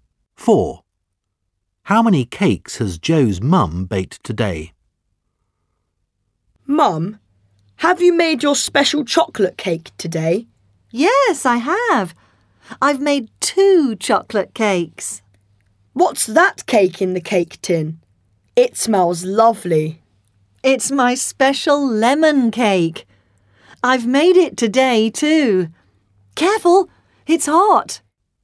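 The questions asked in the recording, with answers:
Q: How many cakes has Joe's mum baked today?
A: Three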